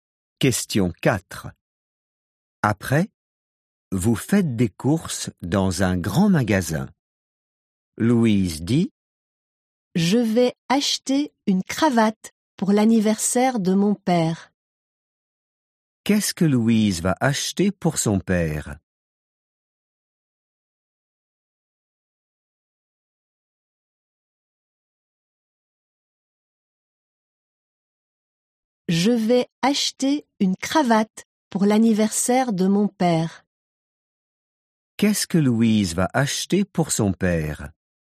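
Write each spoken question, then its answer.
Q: Qu'est-ce que Louise va acheter pour son père?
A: Une cravate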